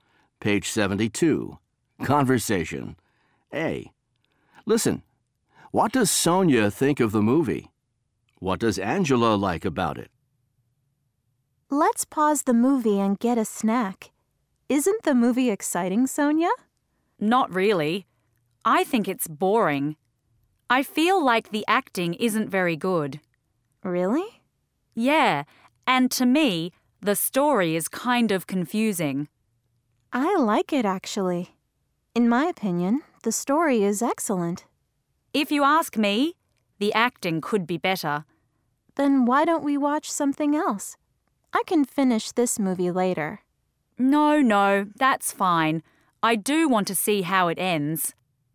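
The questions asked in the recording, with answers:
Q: What does Sonia think of the movie?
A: She thinks it's boring.

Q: What does Angela like about it?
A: The story; she thinks it's excellent.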